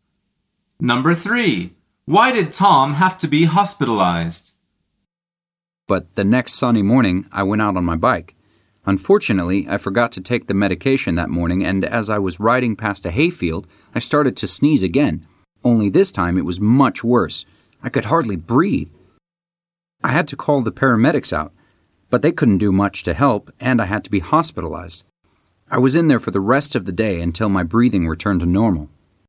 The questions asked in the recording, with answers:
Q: Why did Tom have to be hospitalized?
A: The answer is because he couldn't breathe properly, and the paramedics couldn't help.